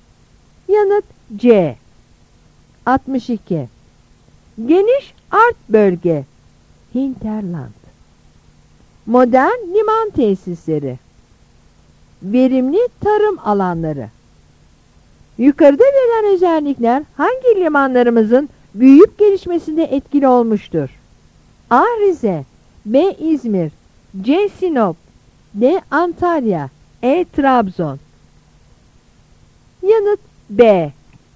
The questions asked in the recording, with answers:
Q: Yukarıda verilen özellikler hangi limanlarımızın büyüyüp gelişmesinde etkili olmuştur?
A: Yanıt B.